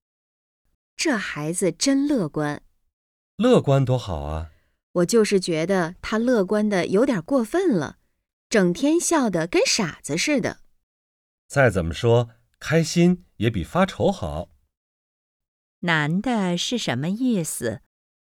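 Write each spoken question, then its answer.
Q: 男的是什么意思?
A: 开心比发愁好,乐观是好事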